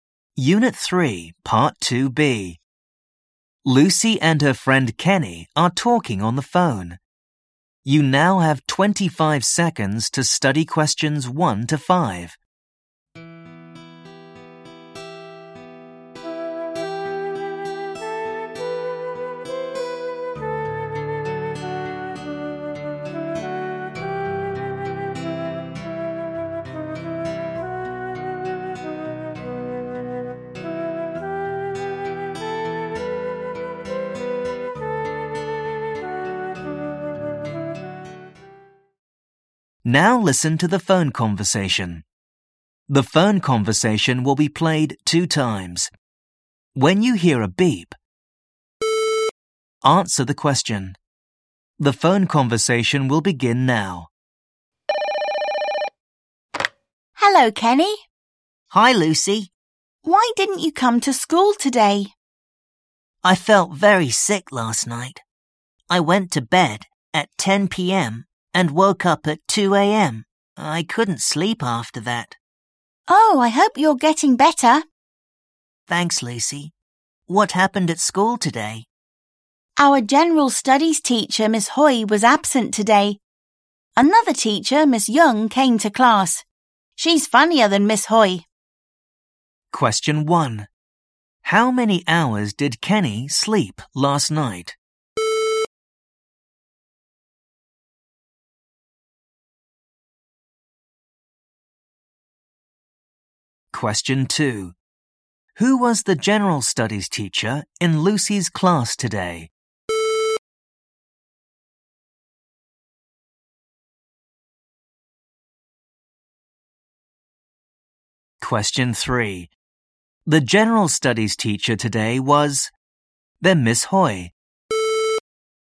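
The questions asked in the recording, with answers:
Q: How many hours did Kenny sleep last night?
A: 4 hours

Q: Who was the general studies teacher in Lucy's class today?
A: Miss Young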